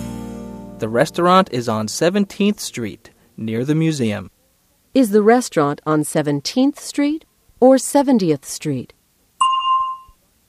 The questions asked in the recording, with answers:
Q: Is the restaurant on 17th Street or 70th Street?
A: It's on 17th Street. 17.